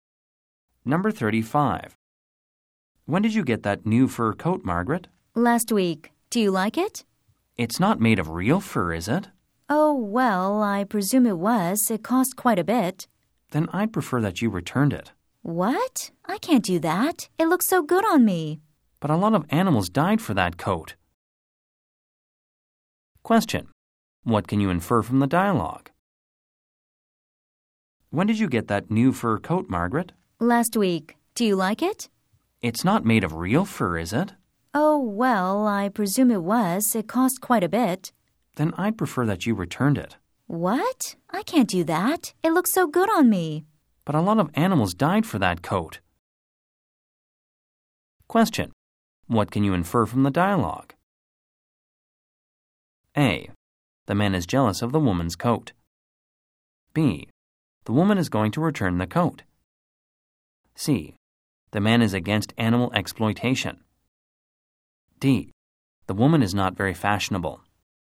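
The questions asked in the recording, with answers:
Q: What can you infer from the dialogue?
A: C: The man is against animal exploitation.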